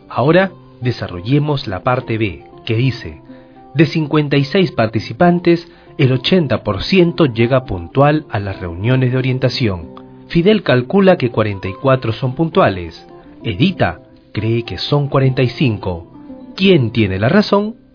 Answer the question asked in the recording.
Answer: Edita tiene la razón.